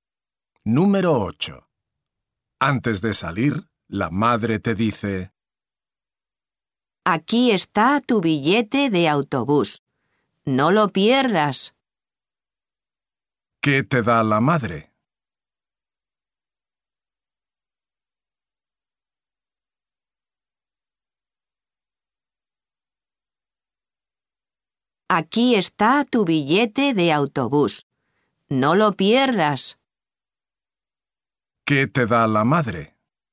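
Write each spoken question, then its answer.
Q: ¿Qué te da la madre?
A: el billete de autobús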